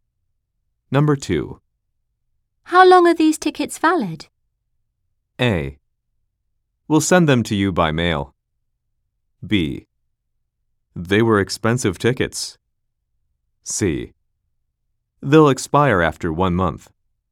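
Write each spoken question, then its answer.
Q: How long are these tickets valid?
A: C: They'll expire after 1 month.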